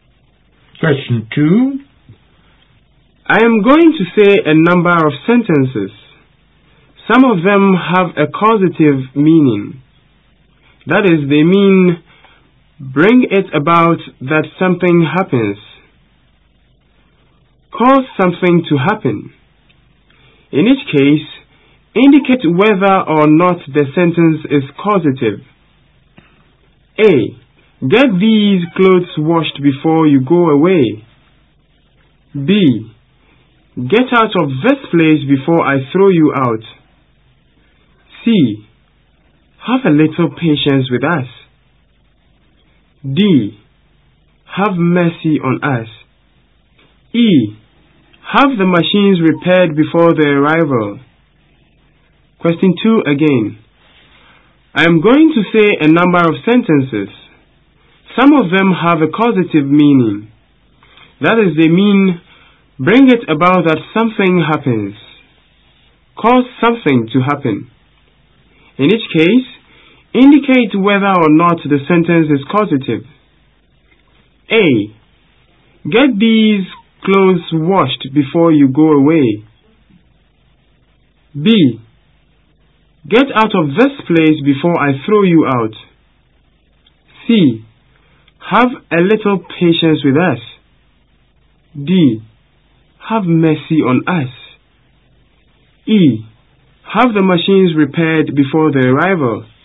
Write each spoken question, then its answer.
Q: Get these clothes washed before you go away.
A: Causative.

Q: Get out of this place before I throw you out.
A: This is not a causative sentence.

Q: Have a little patience with us.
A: Not a causative sentence.

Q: Have mercy on us.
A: Not causative.

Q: Have the machines repaired before their arrival.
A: This is a causative sentence.